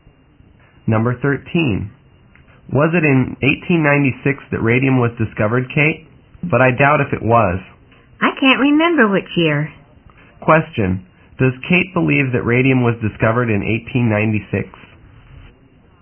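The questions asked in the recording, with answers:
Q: Does Kate believe that radium was discovered in 1896?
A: No, she doubts it.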